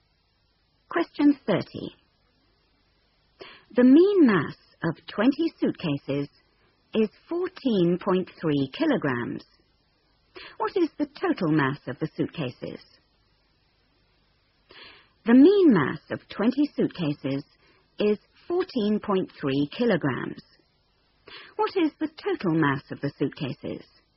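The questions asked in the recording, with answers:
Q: What is the total mass of the suitcases?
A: 286 kg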